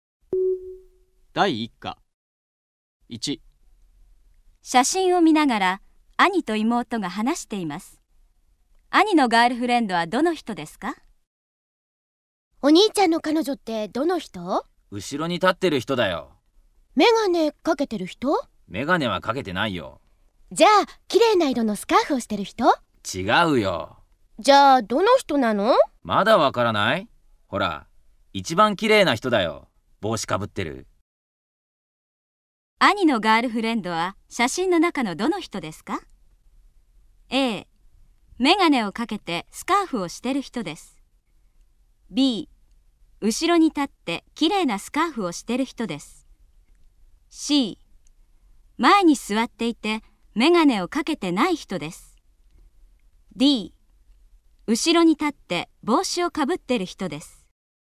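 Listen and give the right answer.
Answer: D: 後ろに立って帽子をかぶってる人です。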